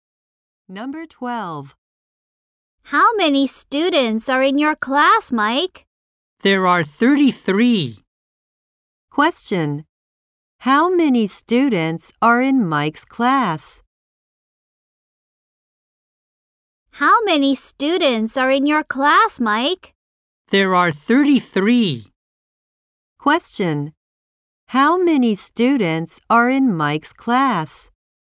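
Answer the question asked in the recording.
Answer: 33.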